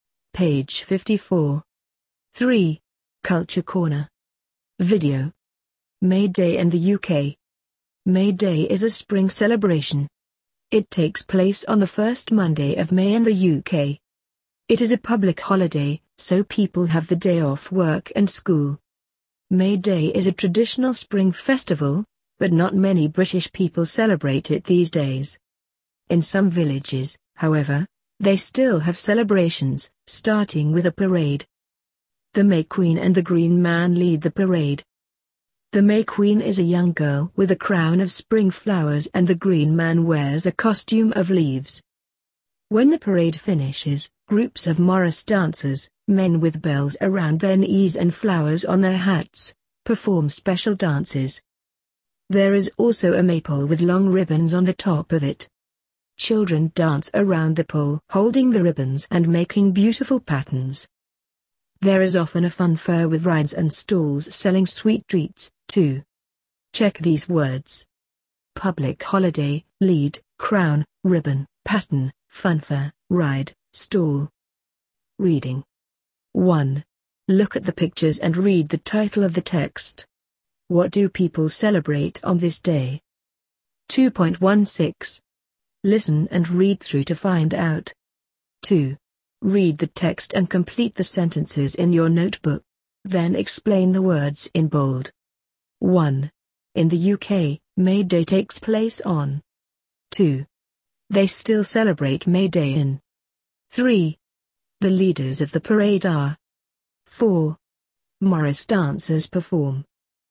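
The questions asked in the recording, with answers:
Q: In the UK, May Day takes place on.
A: the first Monday of May

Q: They still celebrate May Day in.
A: some villages

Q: The leaders of the parade are.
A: the May Queen and the Green Man

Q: Morris dancers perform.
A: special dances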